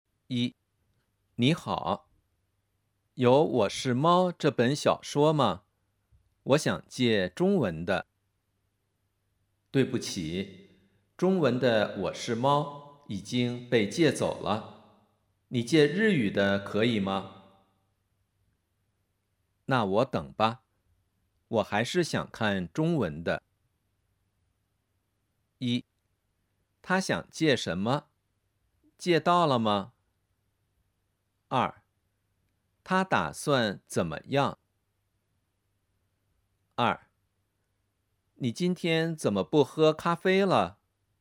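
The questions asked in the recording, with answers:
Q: 他想借什么?借到了吗?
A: 他想借中文的《我是猫》,没借到。

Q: 他打算怎么样?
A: 他打算等中文版。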